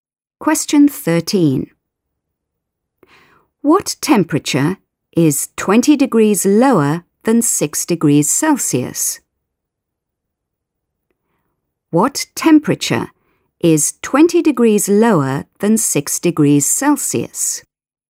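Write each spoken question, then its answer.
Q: What temperature is 20 degrees lower than 6 degrees Celsius?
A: -14°C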